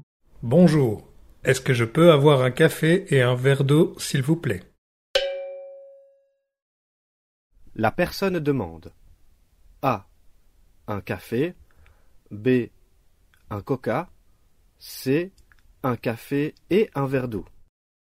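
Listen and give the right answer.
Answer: C: Un café et un verre d'eau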